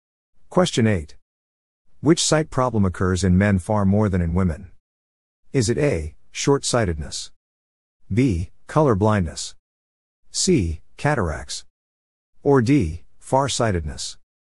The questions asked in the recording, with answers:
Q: Which sight problem occurs in men far more than in women?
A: The answer is B. Color blindness.